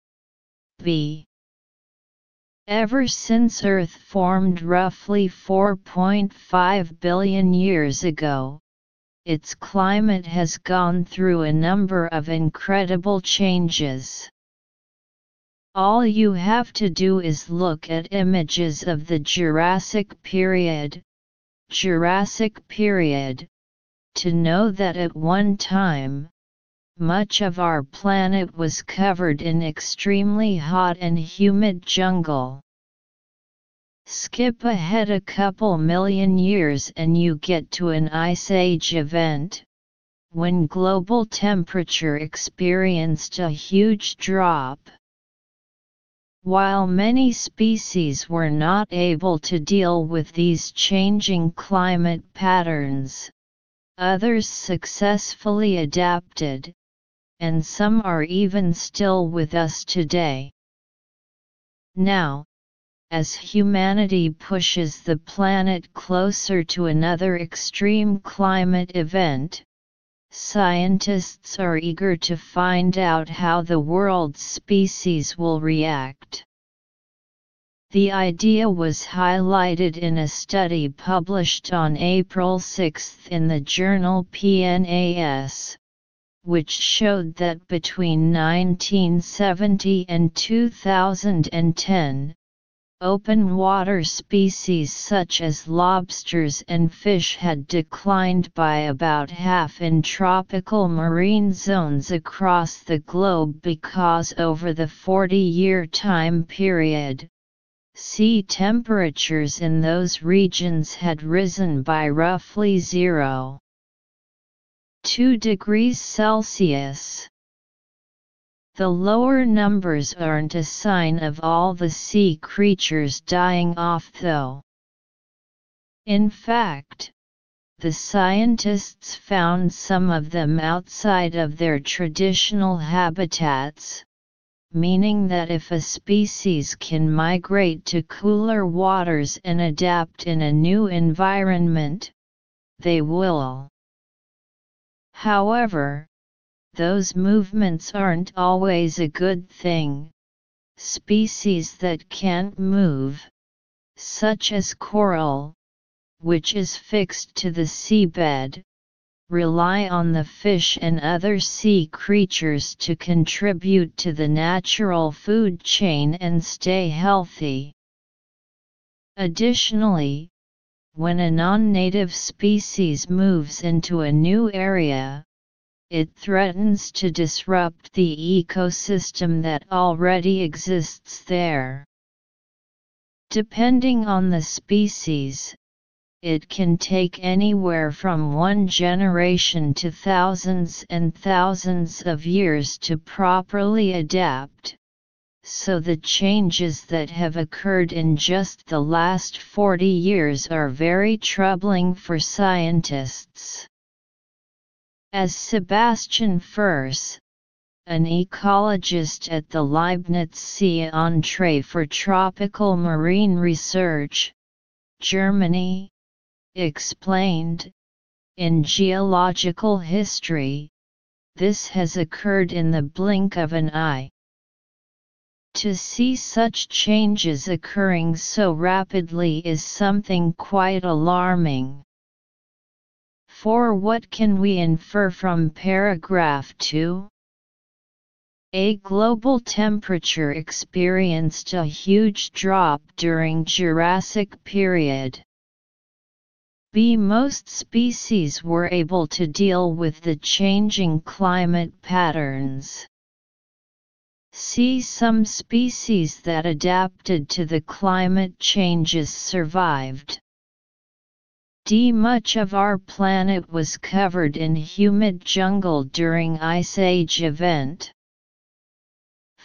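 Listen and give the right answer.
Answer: C: Some species that adapted to the climate changes survived.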